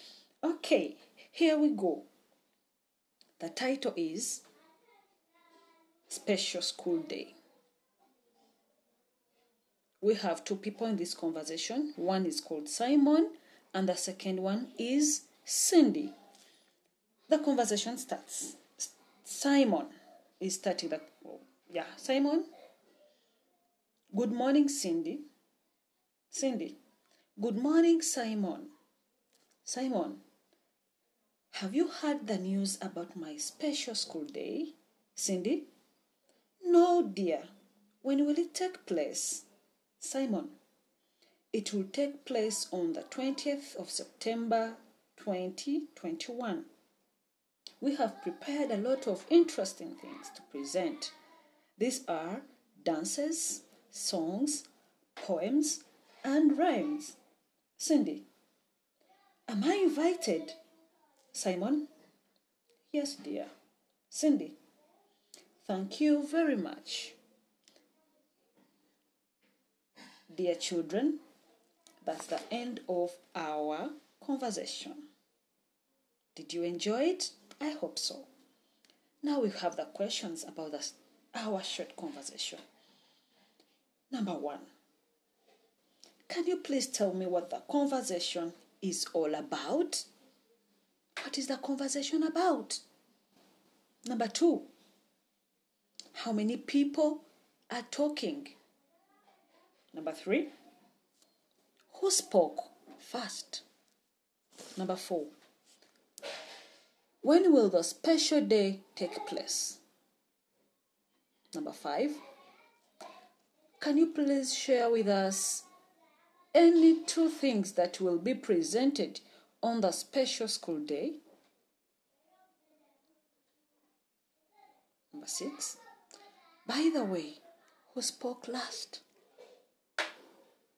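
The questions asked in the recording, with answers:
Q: can you please tell me what the conversation is all about?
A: Simon's special school day

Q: how many people are talking?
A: Two (Simon and Cindy)

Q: who spoke first?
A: Simon

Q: when will the special day take place?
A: On the 20th of September 2021

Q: can you please share with us any two things that will be presented on the special school day?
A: Any two of: dances, songs, poems, rhymes

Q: by the way, who spoke last?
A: Cindy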